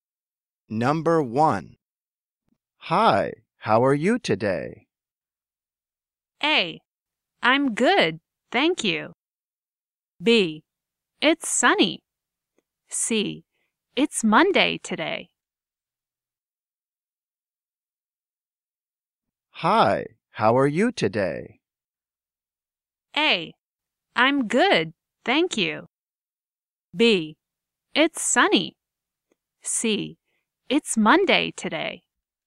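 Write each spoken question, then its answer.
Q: Hi, how are you today?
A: A: I'm good, thank you.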